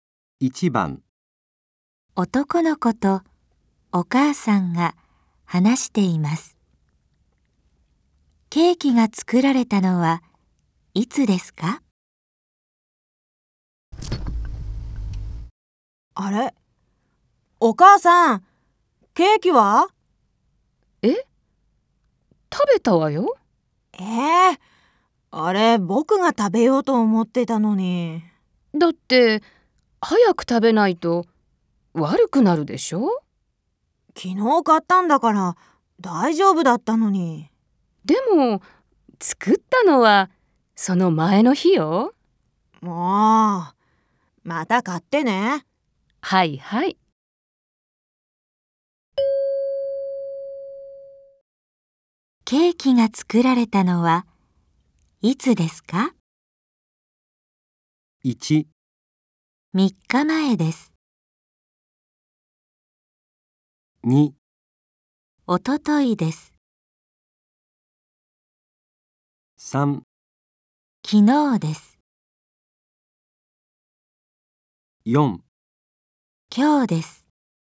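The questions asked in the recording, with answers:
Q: ケーキが作られたのはいつですか?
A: 2: おとといです。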